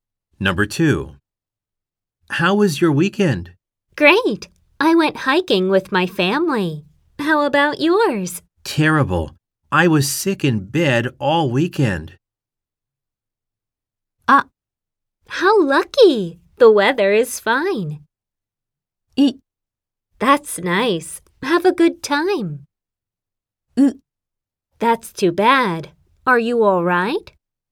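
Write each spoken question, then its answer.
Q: Terrible. I was sick in bed all weekend.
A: ウ: That's too bad. Are you all right?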